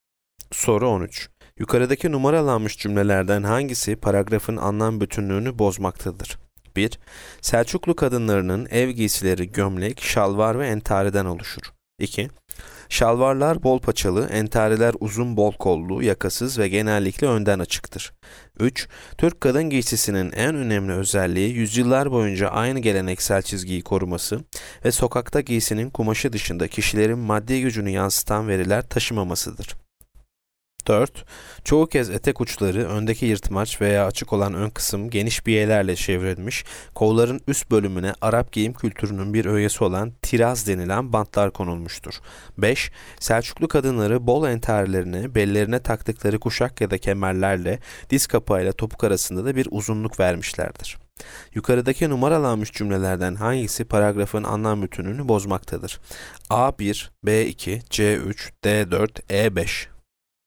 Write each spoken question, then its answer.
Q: Yukarıdaki numaralanmış cümlelerden hangisi paragrafın anlam bütünlüğünü bozmaktadır?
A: Yanıt C. 3.